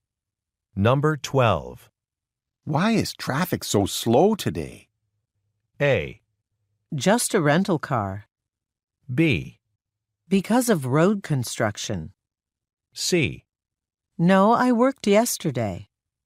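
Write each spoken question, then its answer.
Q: Why is traffic so slow today?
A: B: Because of road construction.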